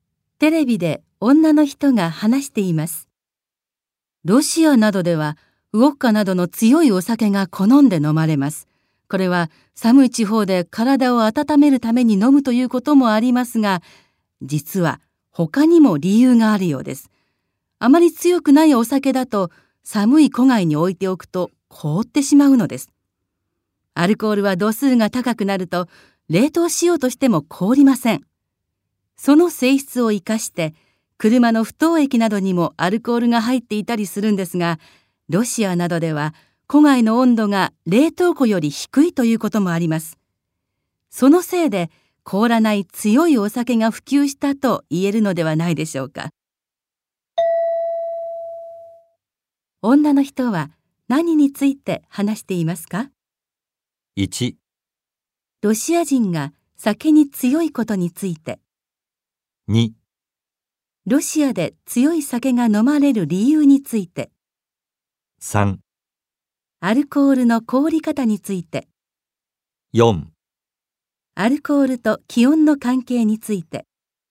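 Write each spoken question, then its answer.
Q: 女の人は何について話していますか?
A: 2: ロシアで強い酒が飲まれる理由について。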